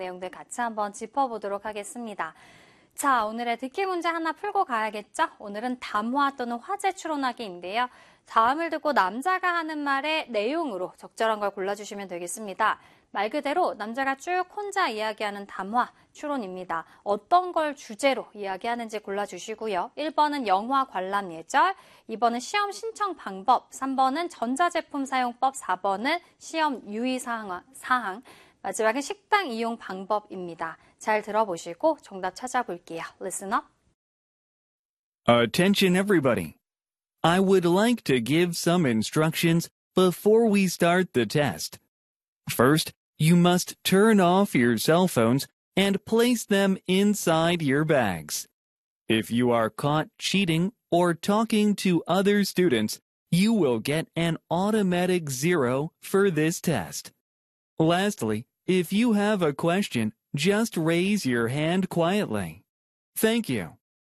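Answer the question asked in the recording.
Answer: 4: 시험 유의사항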